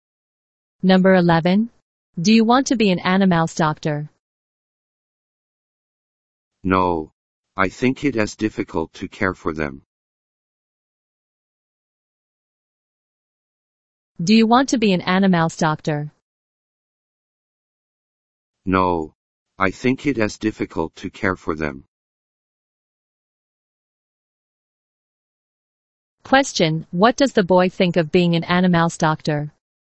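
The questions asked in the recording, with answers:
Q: Question, what does the boy think of being an animal's doctor?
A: He thinks it is difficult to care for animals.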